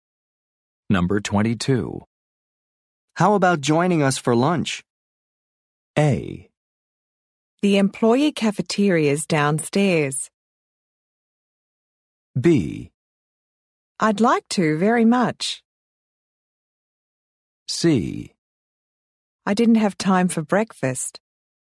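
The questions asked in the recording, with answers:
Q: How about joining us for lunch?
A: B: I'd like to very much.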